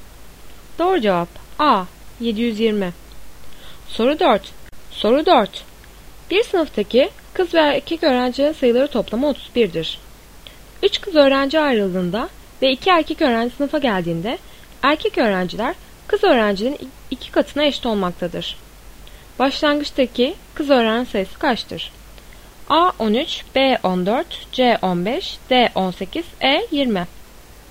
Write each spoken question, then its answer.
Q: Başlangıçtaki kız öğrenci sayısı kaçtır?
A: Doğru cevap A 13.